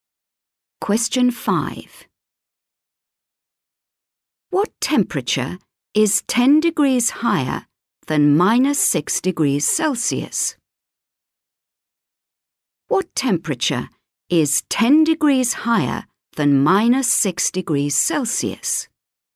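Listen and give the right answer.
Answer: 4 degrees Celsius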